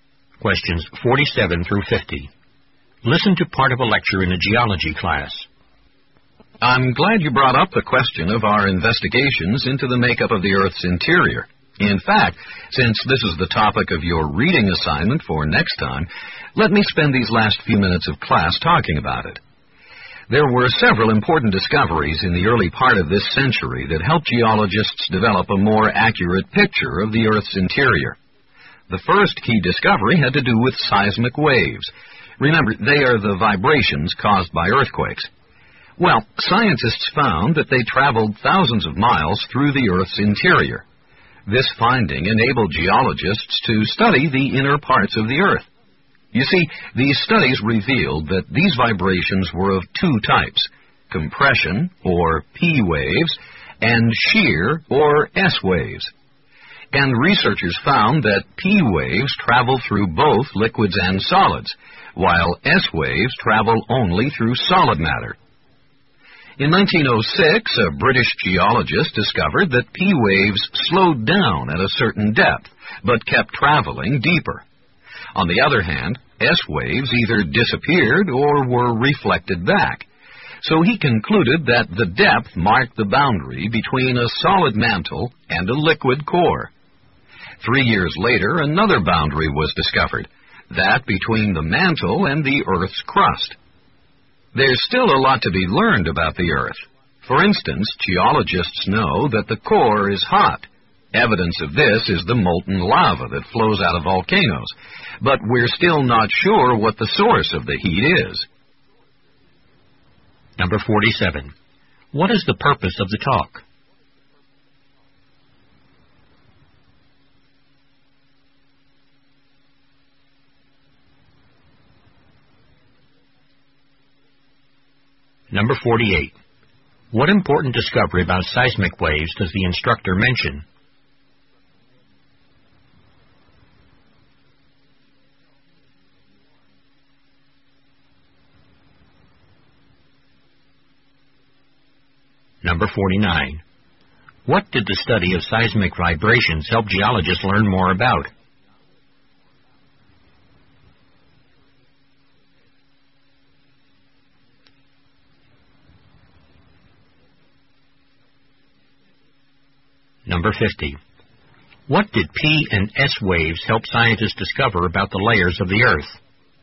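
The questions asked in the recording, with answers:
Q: What important discovery about seismic waves does the instructor mention?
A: They travel thousands of miles through the Earth's interior

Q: What did the study of seismic vibrations help geologists learn more about?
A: The inner parts of the Earth

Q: What did P and S waves help scientists discover about the layers of the Earth?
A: The boundary between a solid mantle and a liquid core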